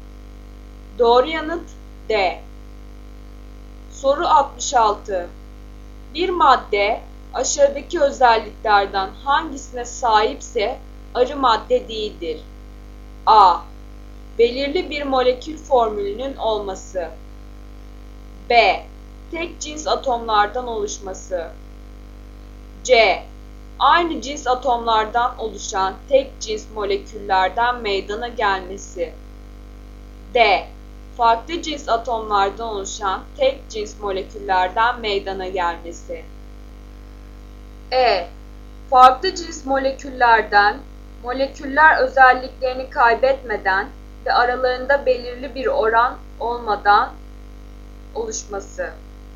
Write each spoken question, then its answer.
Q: Bir madde aşağıdaki özelliklerden hangisine sahipse arı madde değildir.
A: Doğru yanıt E.